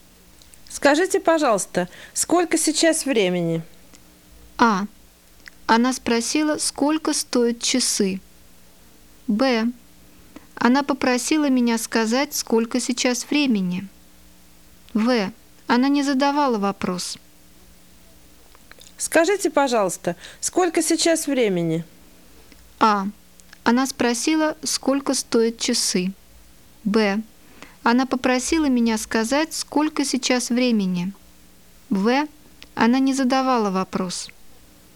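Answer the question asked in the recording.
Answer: Б: Она попросила меня сказать, сколько сейчас времени.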